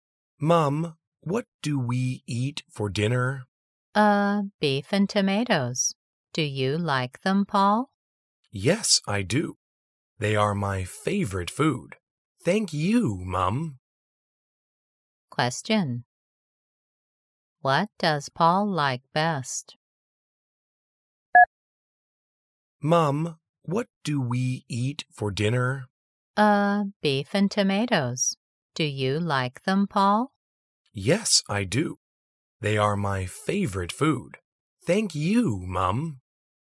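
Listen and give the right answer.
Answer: Beef and tomatoes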